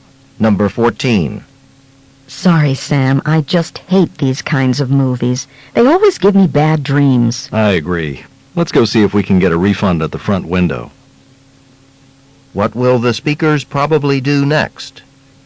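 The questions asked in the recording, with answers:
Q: What will the speakers probably do next?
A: Try to get a refund and leave the movie.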